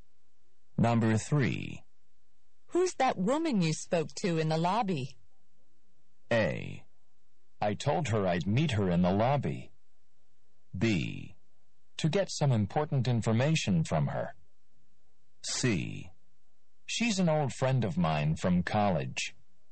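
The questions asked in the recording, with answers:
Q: Who's that woman you spoke to in the lobby?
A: C: She's an old friend of mine from college.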